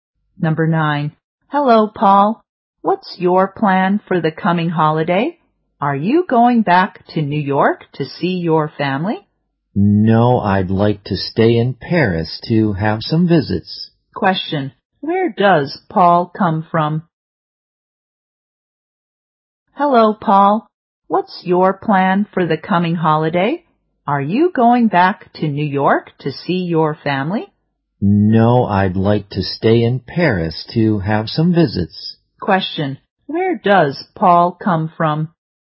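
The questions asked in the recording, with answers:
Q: Where does Paul come from?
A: New York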